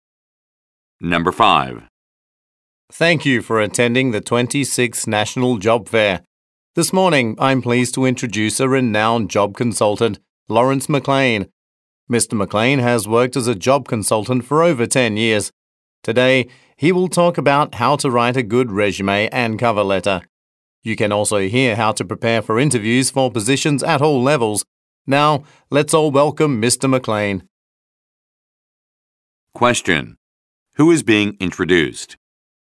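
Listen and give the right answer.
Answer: A job consultant, Lawrence McLean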